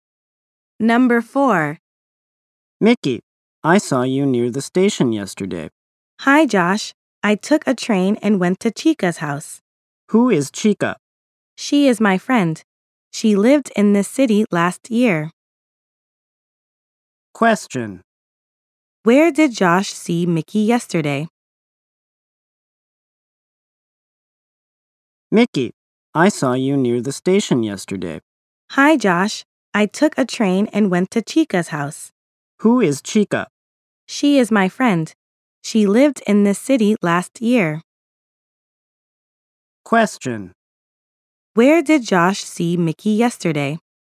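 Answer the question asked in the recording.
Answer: Near the station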